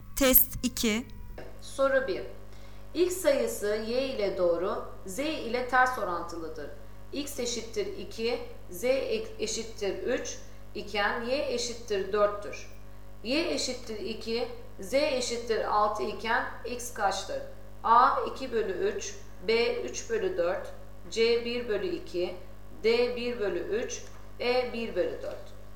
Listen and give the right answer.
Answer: Doğru cevap C 1 bölü 2.